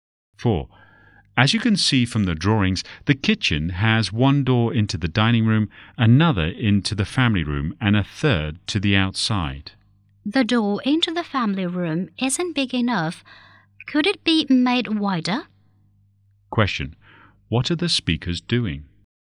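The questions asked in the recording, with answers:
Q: What are the speakers doing?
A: Discussing the plans (drawings) for a house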